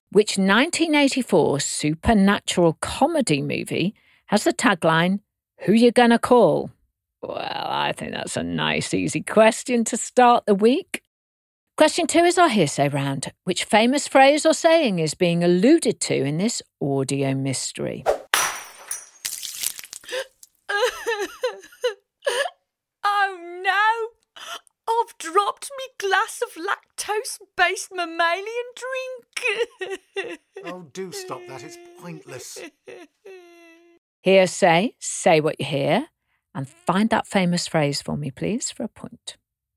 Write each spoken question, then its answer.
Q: Which famous phrase or saying is being alluded to in this audio mystery?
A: no use crying over spilt milk